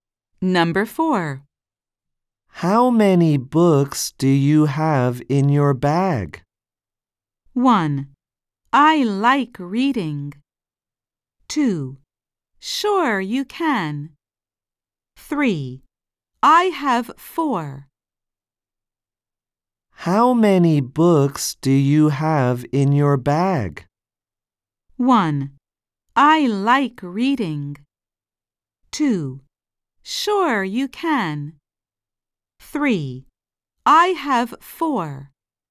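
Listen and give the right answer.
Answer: 3: I have 4.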